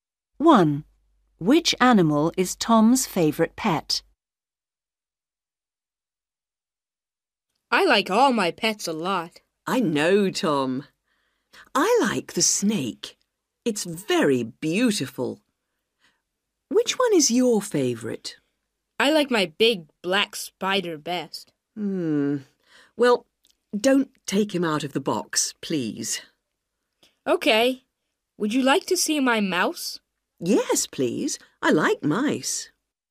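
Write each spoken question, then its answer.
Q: Which animal is Tom's favorite pet?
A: his big black spider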